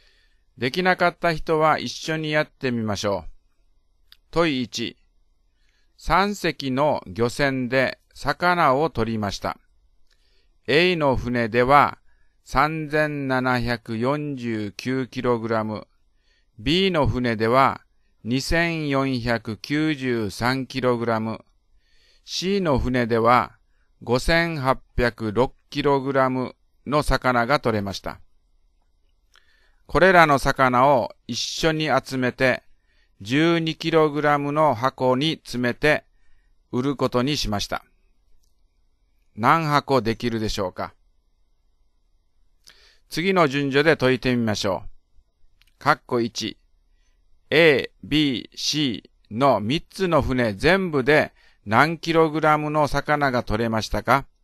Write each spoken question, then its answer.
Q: A、B、C の3つの船全部で何 kg の魚が取れましたか?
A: 12048kg です